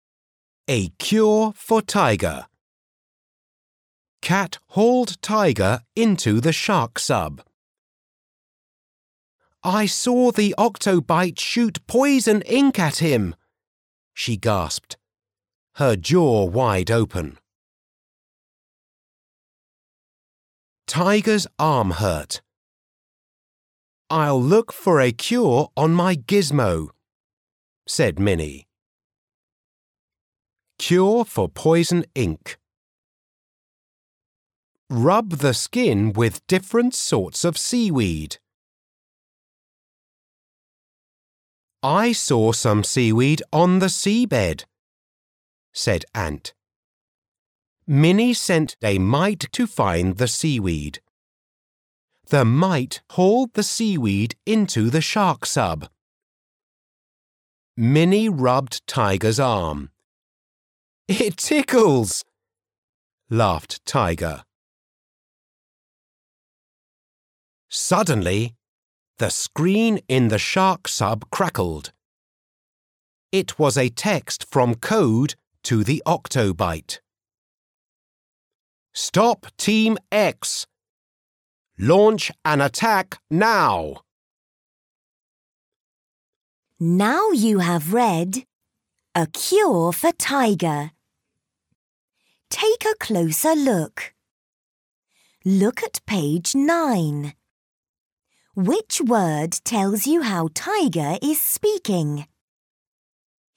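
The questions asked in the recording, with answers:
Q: Which word tells you how Tiger is speaking?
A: laughed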